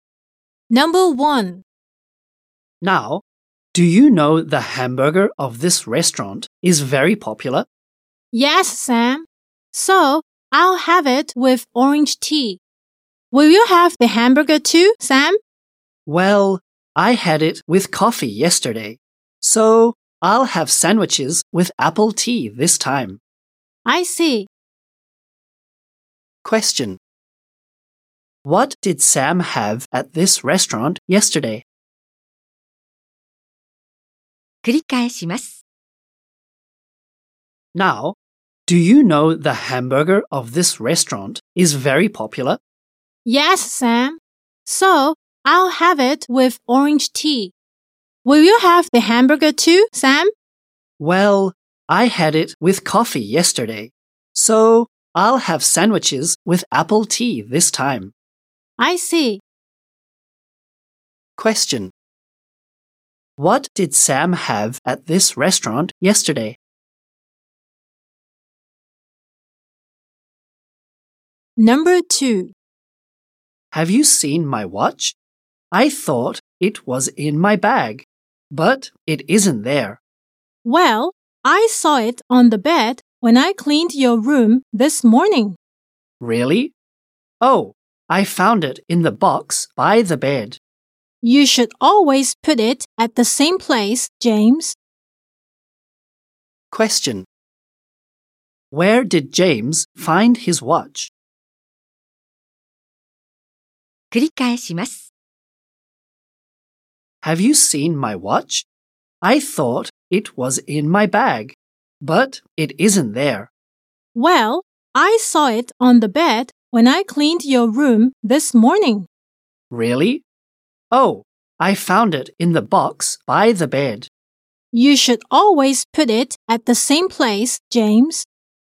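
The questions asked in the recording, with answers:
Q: What did Sam have at this restaurant yesterday?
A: A hamburger with coffee

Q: Where did James find his watch?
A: In the box by the bed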